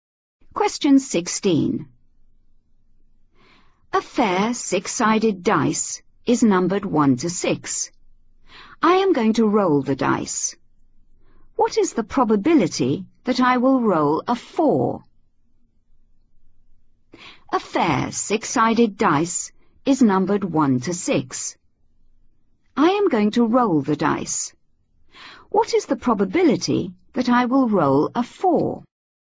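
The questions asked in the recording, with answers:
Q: What is the probability that I will roll a 4?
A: 1/6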